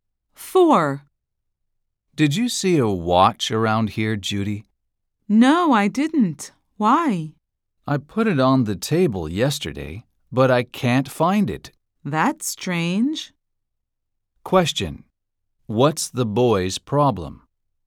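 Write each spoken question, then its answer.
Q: What's the boy's problem?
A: He can't find his watch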